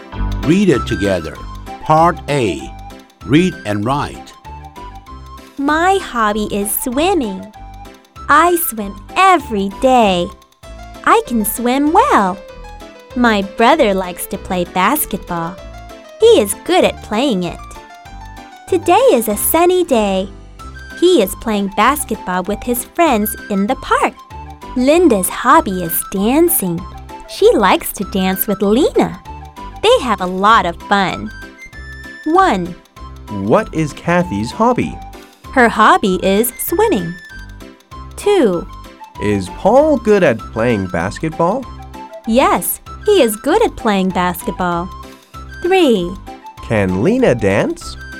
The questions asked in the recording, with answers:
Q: Can Lena dance?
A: Yes, she can.